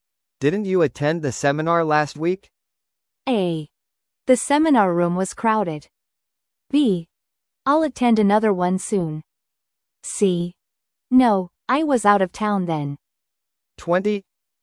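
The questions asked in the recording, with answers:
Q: Didn't you attend the seminar last week?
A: C: No, I was out of town then.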